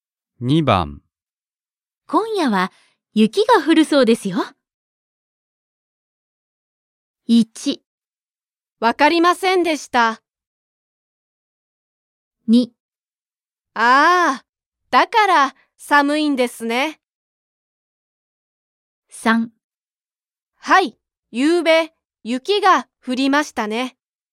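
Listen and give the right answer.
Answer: 2: ああ、だから寒いんですね。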